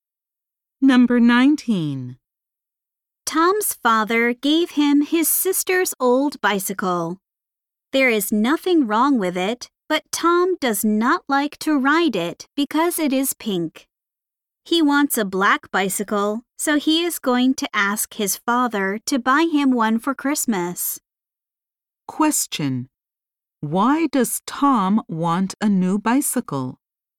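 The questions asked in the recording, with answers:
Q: Why does Tom want a new bicycle?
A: He does not like the pink color of his sister's old bicycle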